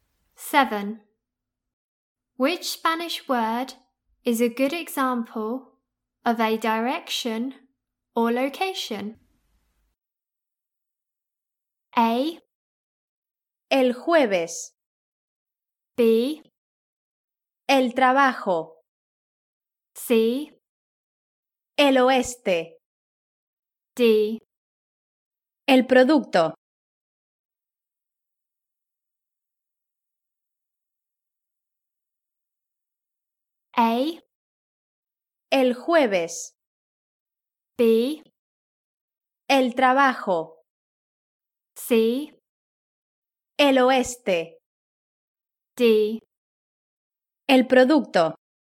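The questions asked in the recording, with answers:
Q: Which Spanish word is a good example of a direction or location?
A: C: El oeste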